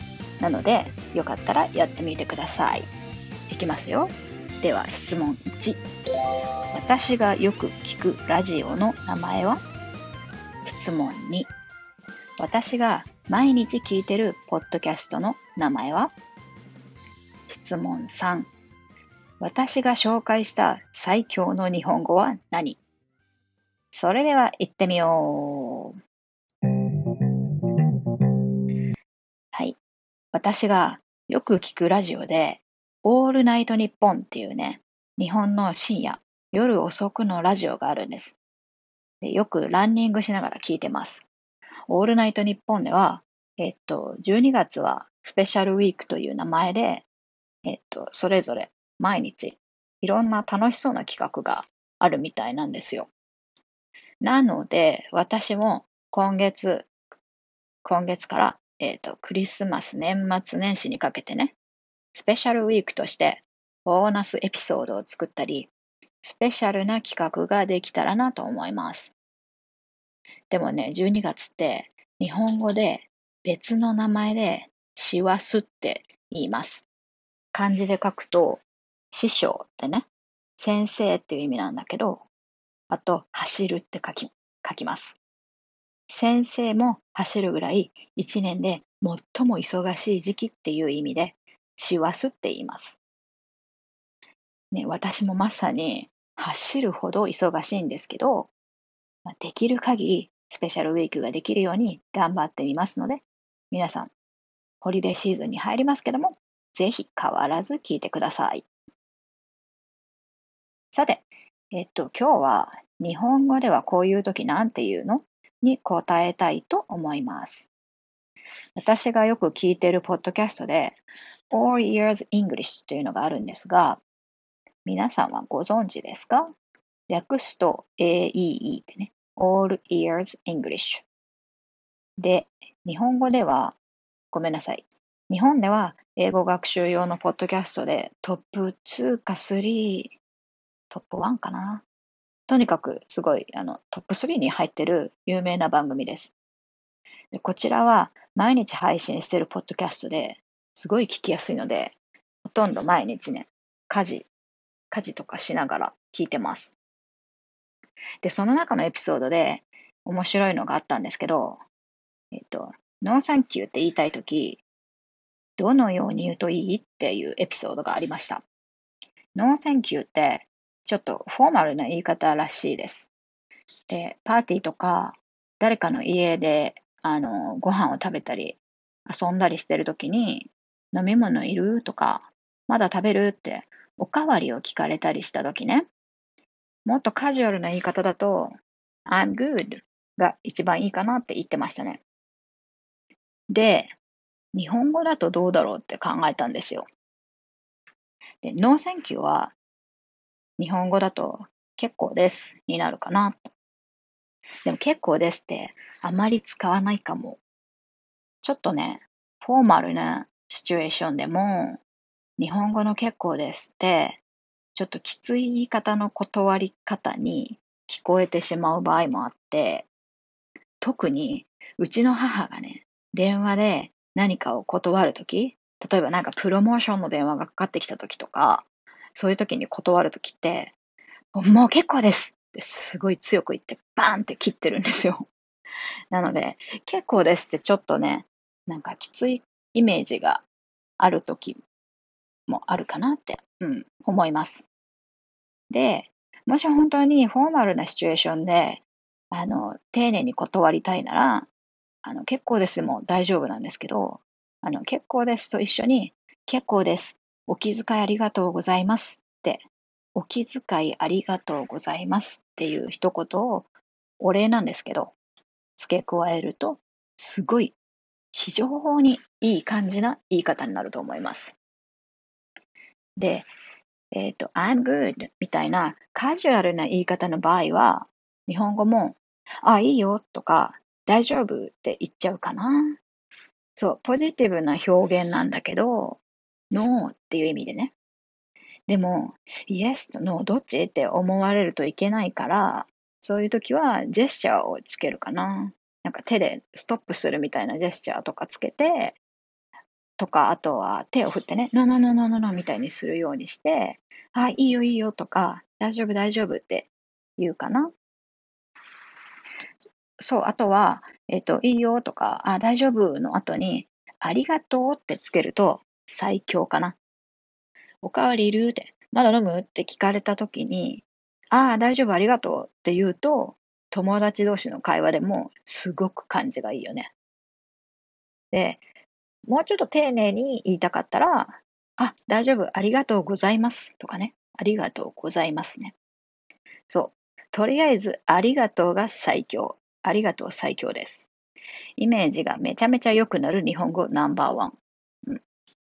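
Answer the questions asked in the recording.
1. オールナイトニッポン
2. All Ears English
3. ありがとう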